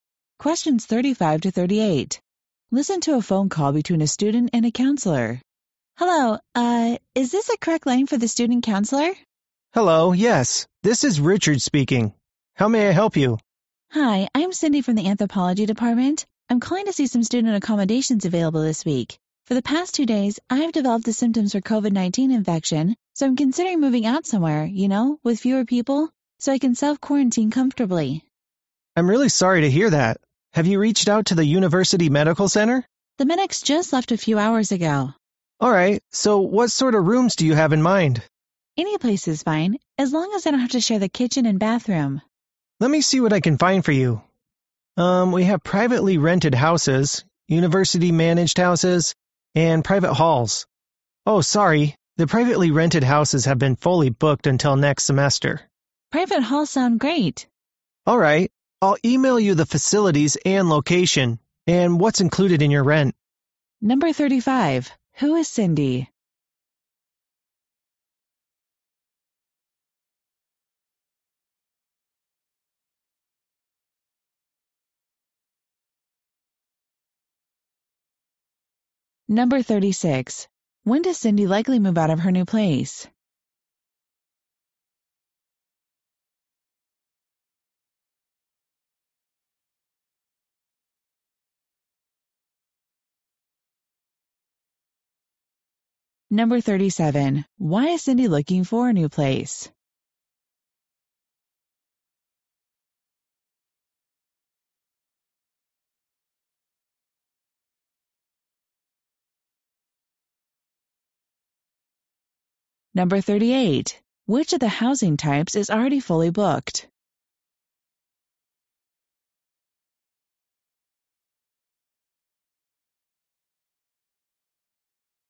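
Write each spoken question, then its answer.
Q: Who is Cindy?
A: A student from the Anthropology Department

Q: Why is Cindy looking for a new place?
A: She has COVID-19 symptoms and wants to self-quarantine

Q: Which of the housing types is already fully booked?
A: Privately rented houses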